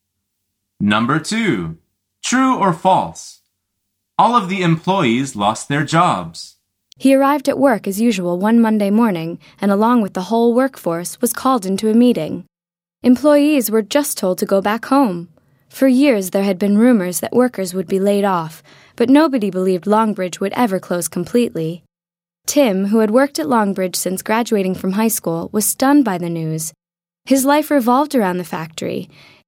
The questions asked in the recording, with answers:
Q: True or false? All of the employees lost their jobs.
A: The answer is true.